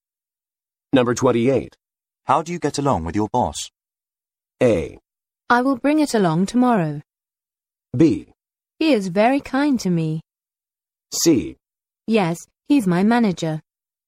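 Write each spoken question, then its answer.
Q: How do you get along with your boss?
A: B: He is very kind to me.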